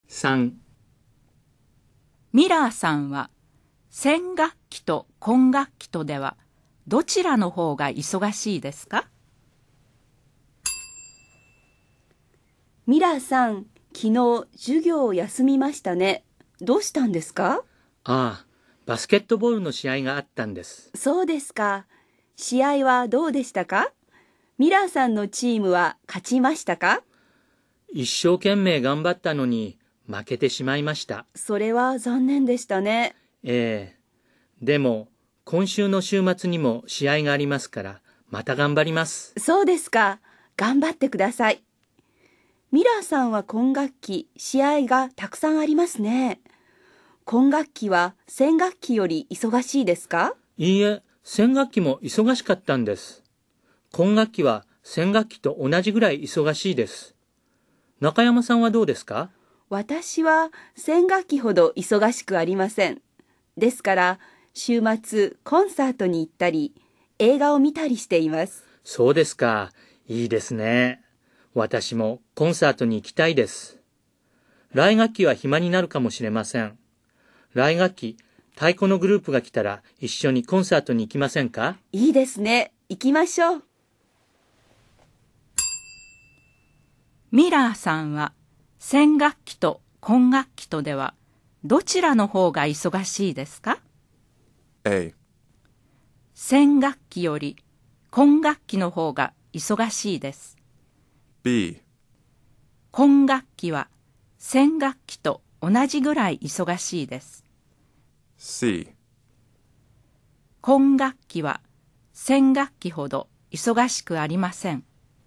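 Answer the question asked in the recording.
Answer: B: 管楽器は弦楽器と同じぐらい忙しいです。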